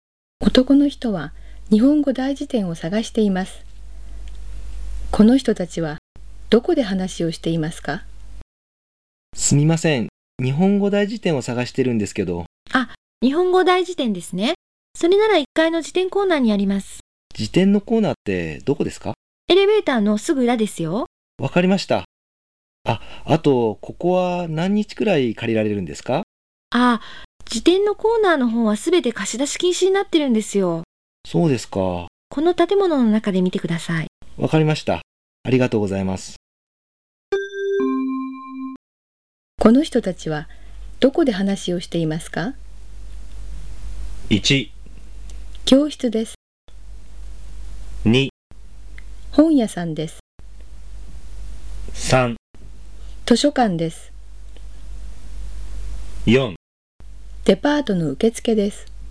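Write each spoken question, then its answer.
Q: この人たちはどこで話をしていますか?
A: 3: 図書館です。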